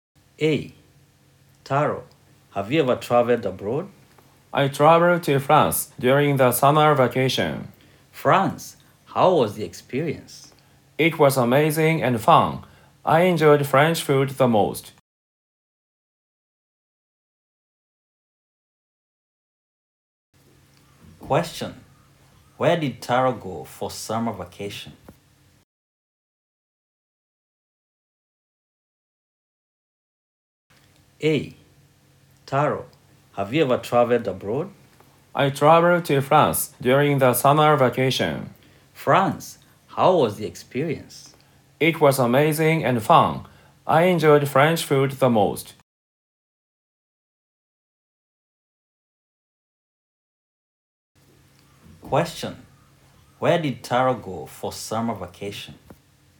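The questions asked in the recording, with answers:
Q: Where did Taro go for summer vacation?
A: He went to France.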